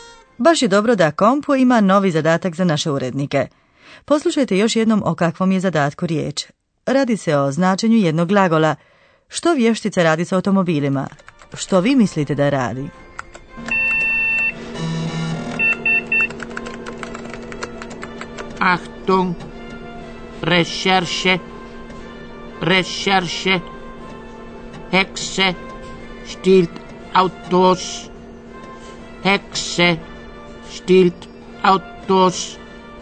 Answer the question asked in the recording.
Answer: Netko koristi karnevalske kostime i krade štelen automobile.